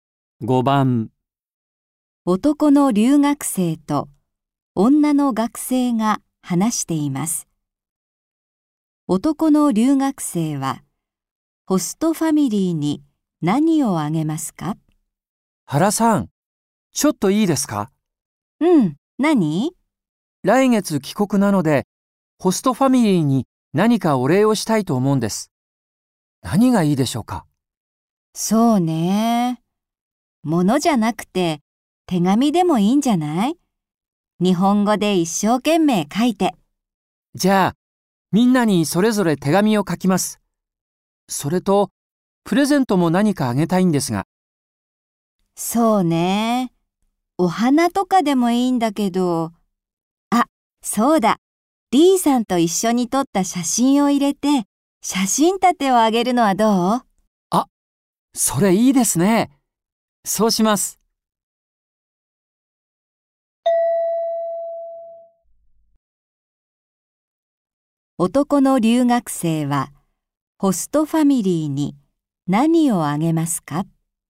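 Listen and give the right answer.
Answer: 手紙と、一緒に撮った写真を入れた写真立て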